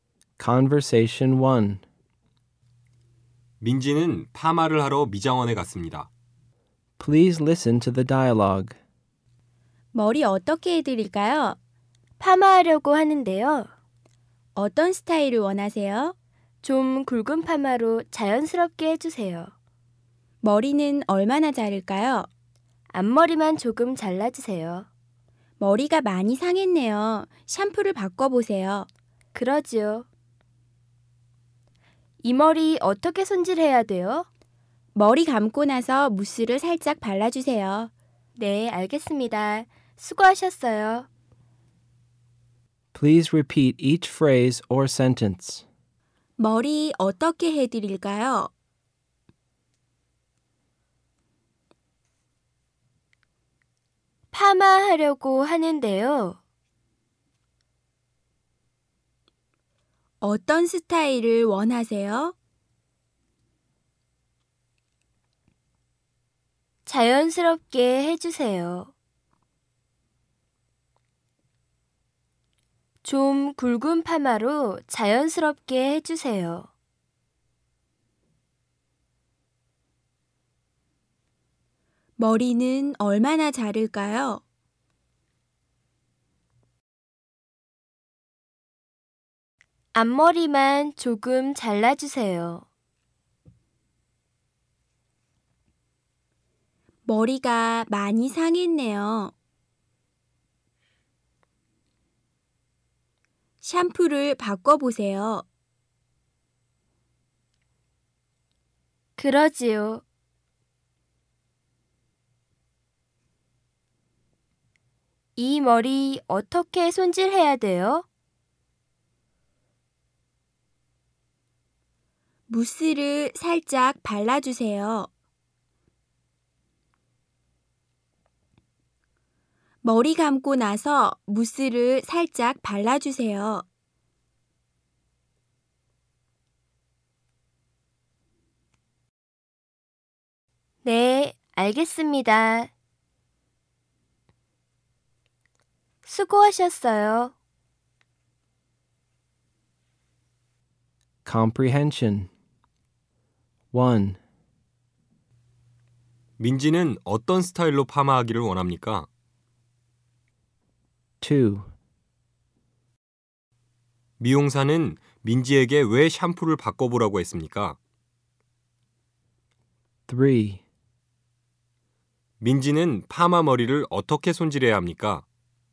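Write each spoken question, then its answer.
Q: 민지는 어떤 스타일로 파마하기를 원합니까?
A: 좀 굵은 파마로 자연스럽게

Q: 미용사는 민지에게 왜 샴푸를 바꿔보라고 했습니까?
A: 머리가 많이 상해서

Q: 민지는 파마 머리를 어떻게 손질해야 합니까?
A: 머리 감고 나서 무스를 살짝 발라야 합니다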